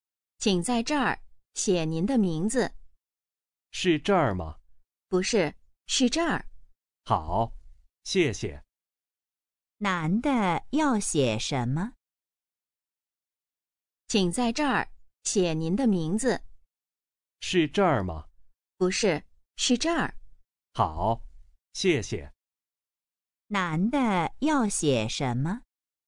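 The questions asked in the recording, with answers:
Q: 男的要写什么?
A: 名字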